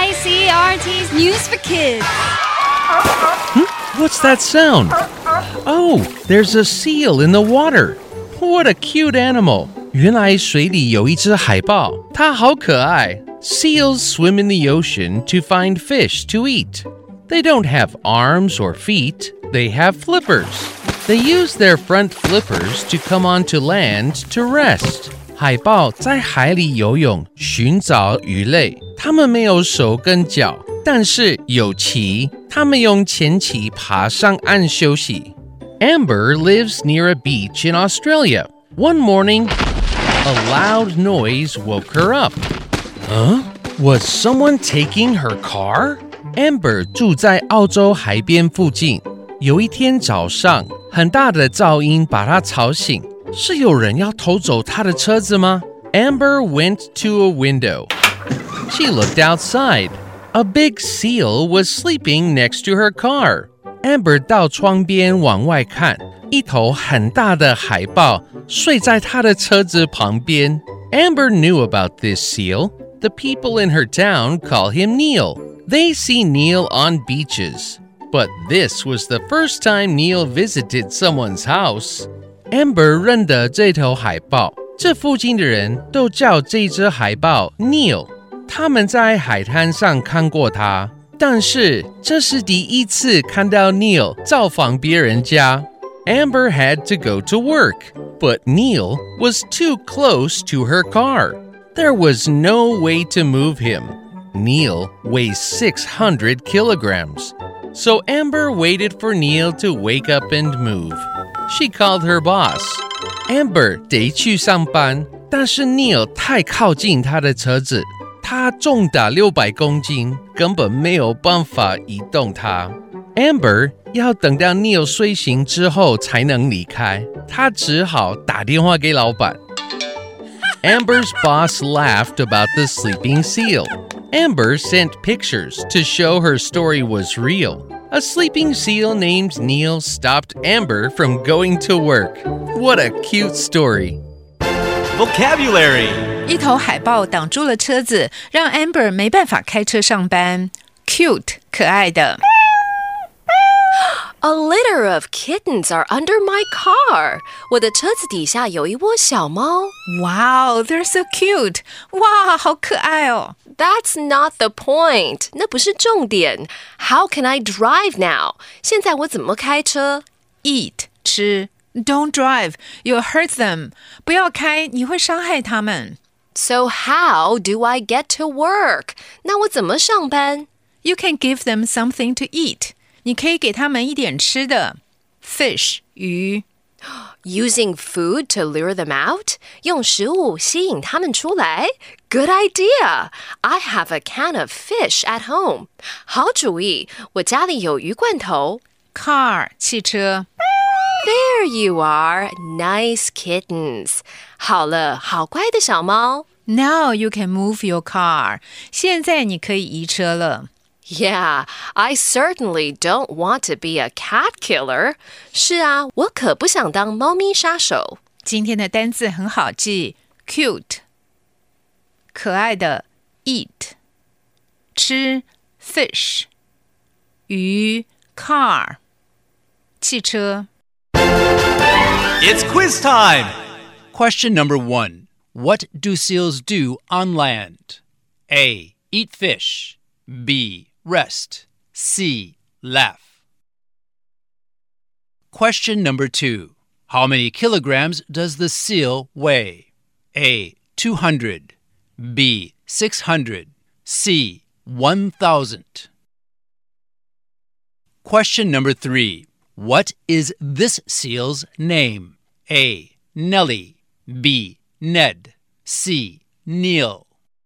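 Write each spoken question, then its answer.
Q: What do seals do on land?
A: B: Rest

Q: How many kilograms does the seal weigh?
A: B: 600

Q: What is this seal's name?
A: C: Neil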